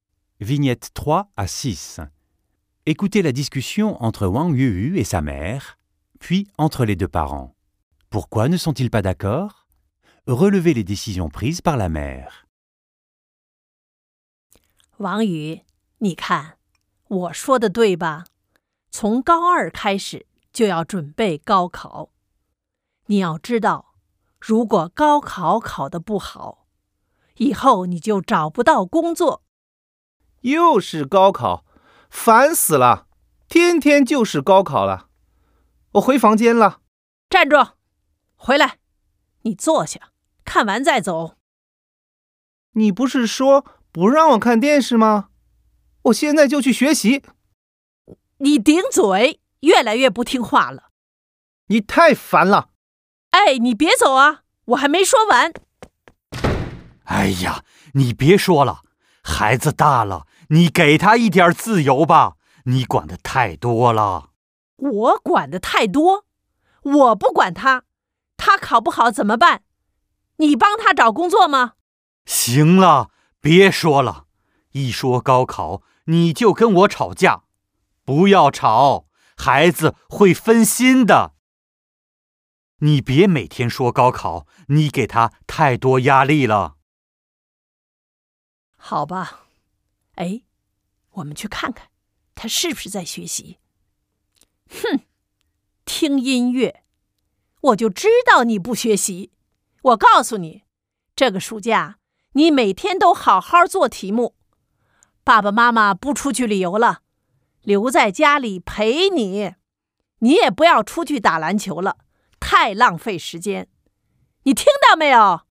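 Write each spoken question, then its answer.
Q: Relevez les décisions prises par la mère.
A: Cet été, il devra faire des exercices tous les jours. Les parents ne partiront pas en voyage et resteront avec lui à la maison. Il ne sortira plus jouer au basket.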